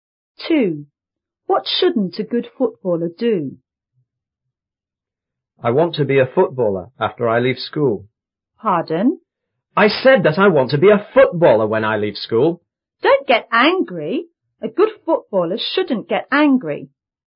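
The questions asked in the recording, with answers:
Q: What shouldn't a good footballer do?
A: Get angry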